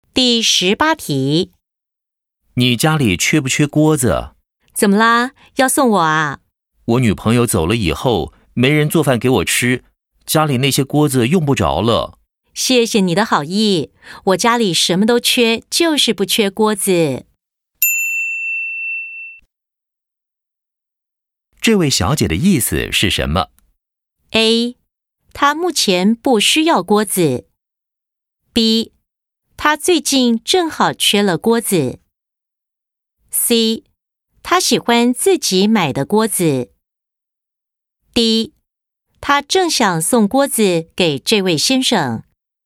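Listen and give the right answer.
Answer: A: 她目前不需要锅子。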